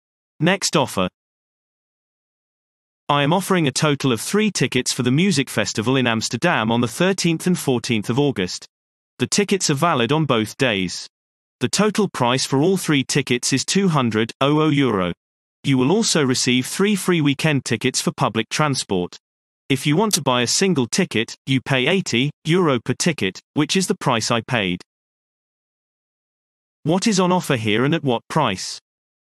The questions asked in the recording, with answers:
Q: What is on offer here and at what price?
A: Response. 3 tickets for the music festival in Amsterdam for €200.